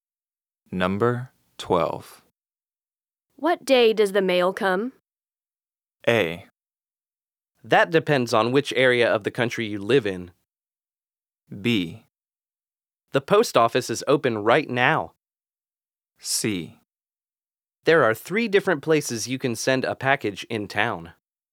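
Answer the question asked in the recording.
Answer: A: That depends on which area of the country you live in.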